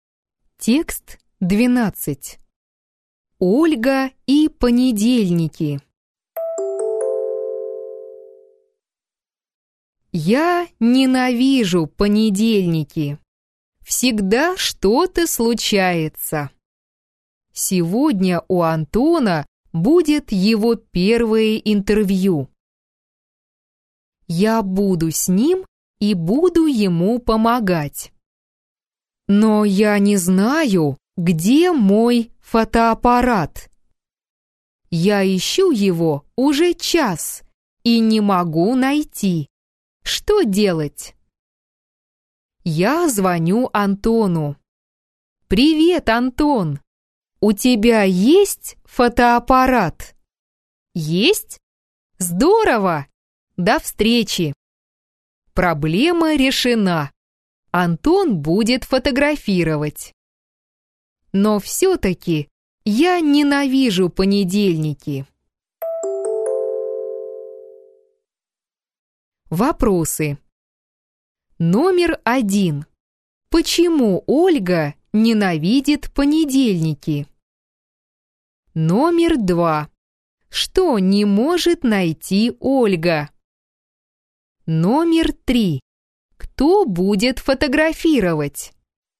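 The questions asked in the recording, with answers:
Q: Почему Ольга ненавидит понедельники?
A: Всегда что-то случается.

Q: Что не может найти Ольга?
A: Свой фотоаппарат.

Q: Кто будет фотографировать?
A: Антон.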